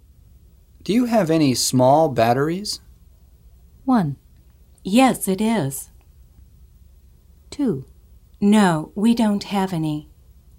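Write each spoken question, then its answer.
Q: Do you have any small batteries?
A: 2: No, we don't have any.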